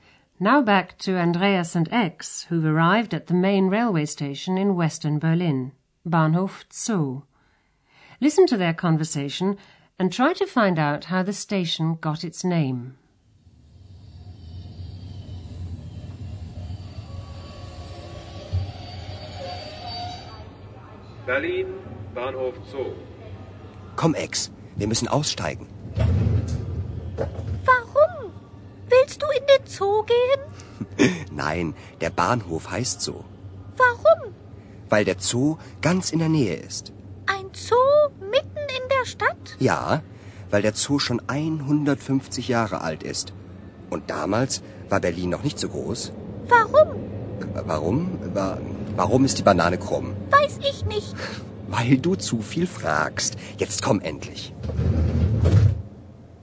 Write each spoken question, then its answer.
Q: Listen to their conversation and try to find out how the station got its name.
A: The station is called Bahnhof Zoo because it's located near the Berlin Zoo.